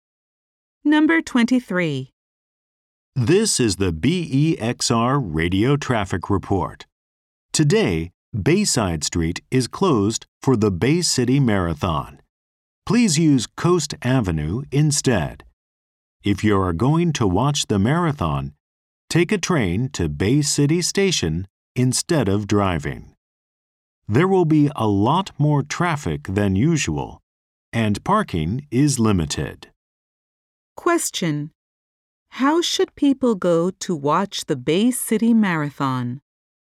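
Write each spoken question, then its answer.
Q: How should people go to watch the Bay City Marathon?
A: By train to Bay City Station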